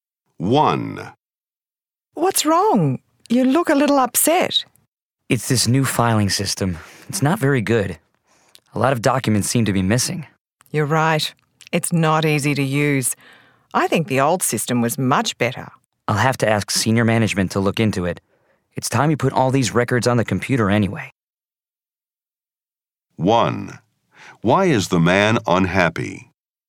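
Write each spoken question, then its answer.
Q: Why is the man unhappy?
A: The new filing system is not very good; documents are missing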